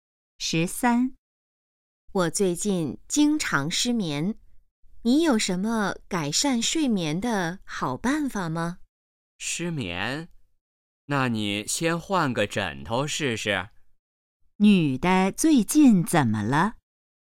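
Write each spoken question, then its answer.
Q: 女的最近怎么了?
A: 经常失眠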